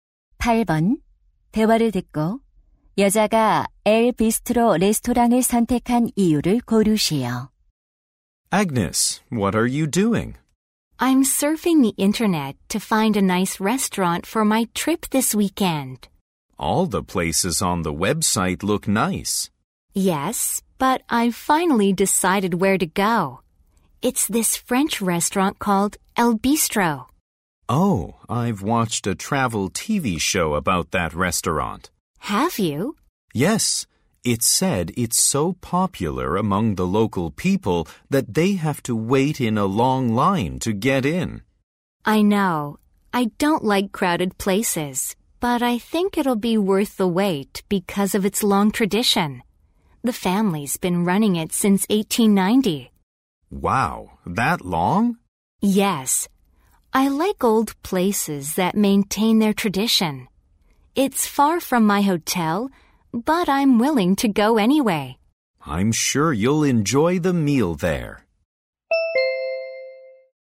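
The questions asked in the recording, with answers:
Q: 대화를 듣고 여자가 엘 비스트로 레스토랑을 선택한 이유를 고르시오.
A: 오랜 전통이 있어서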